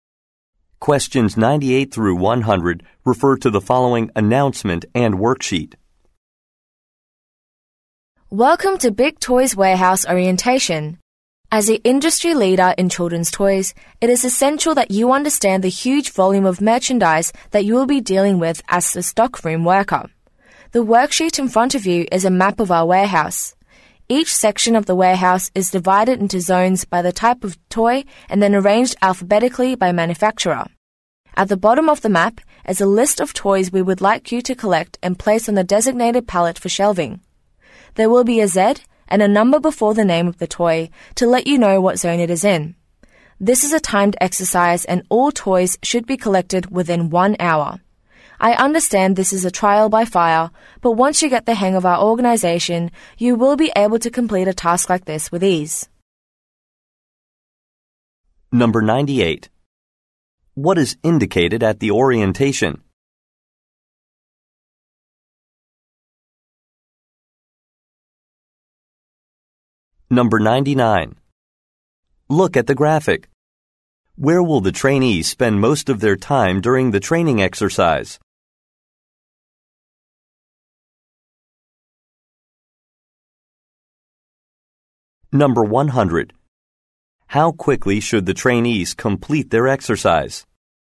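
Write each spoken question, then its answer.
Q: How quickly should the trainees complete their exercise?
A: Within 1 hour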